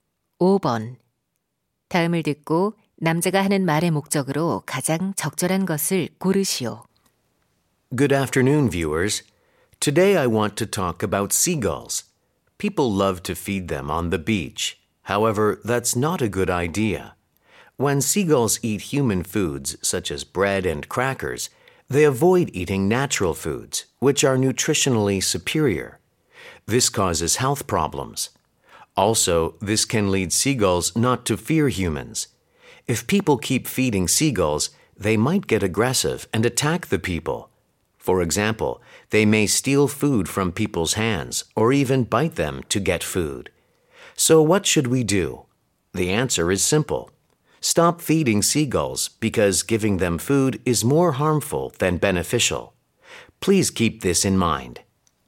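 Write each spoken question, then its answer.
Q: 다음을 듣고 남자가 하는 말의 목적으로 가장 적절한 것을 고르시오.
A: 갈매기에게 먹이를 주지 말 것을 당부하려고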